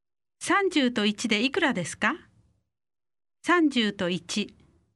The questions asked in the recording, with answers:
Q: 30と1でいくらですか30と1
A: 31